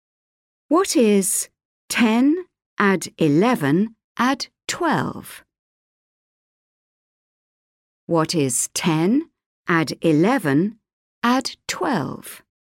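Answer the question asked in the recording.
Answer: 33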